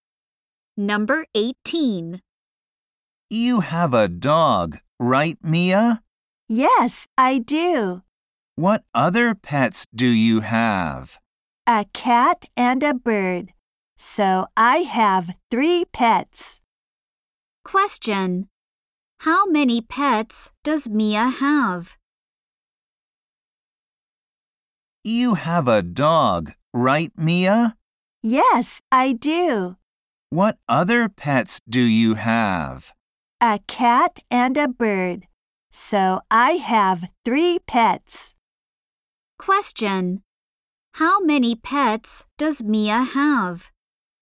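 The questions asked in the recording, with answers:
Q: How many pets does Mia have?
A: Three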